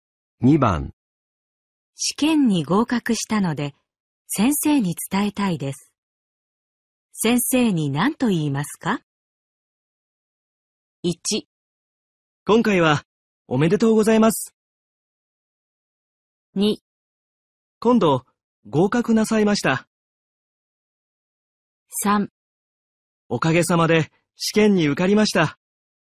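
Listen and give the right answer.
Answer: 3: おかげさまで試験に受かりました。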